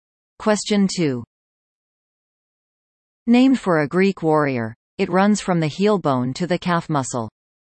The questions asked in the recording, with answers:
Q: Named for a Greek warrior, it runs from the heel bone to the calf muscle.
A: The answer? Achilles tendon.